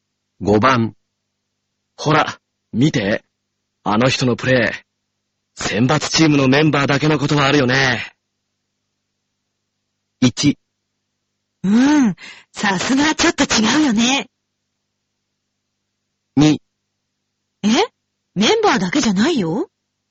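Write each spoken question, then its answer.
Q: 選抜チームのメンバーだけのことはあるよね。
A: 1: うん。さすがちょっと違うよね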